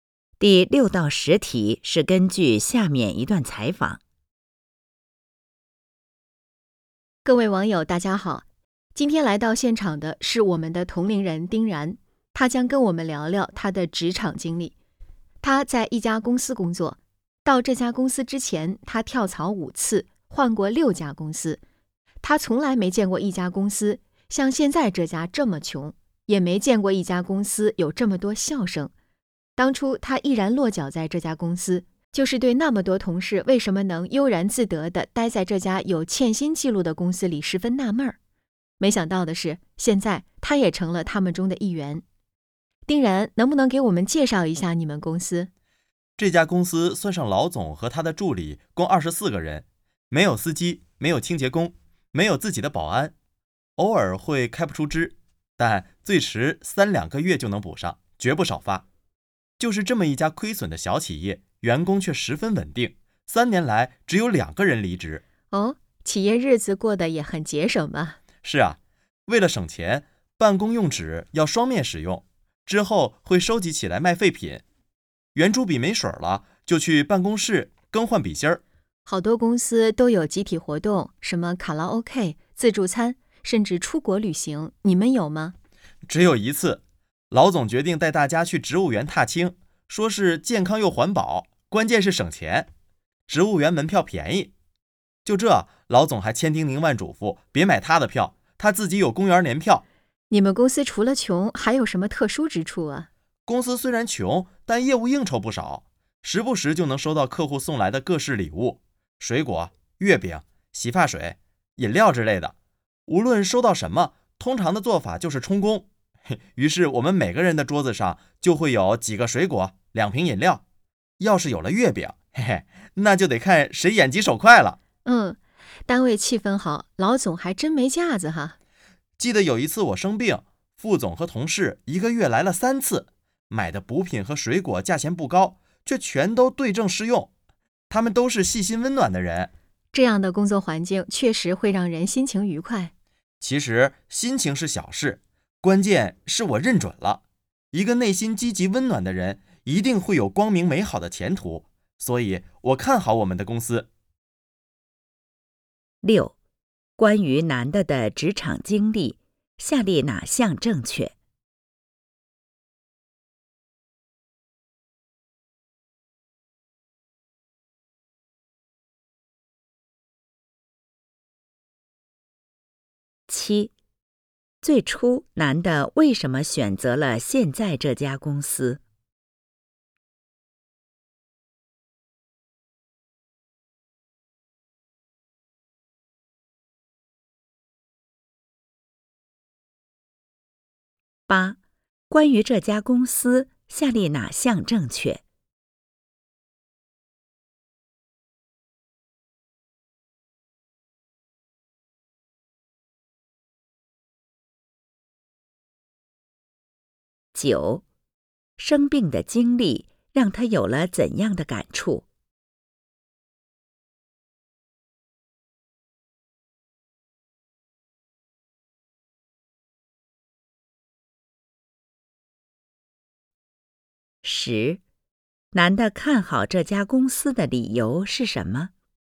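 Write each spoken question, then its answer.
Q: 最初男的为什么选择了现在这家公司?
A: 他很纳闷,为什么那么多同事能悠然自得地待在这家有欠薪记录的公司里

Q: 生病的经历让他有了怎样的感触?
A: 同事们都是细心温暖的人

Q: 男的看好这家公司的理由是什么?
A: 内心积极温暖的人一定会有光明美好的前途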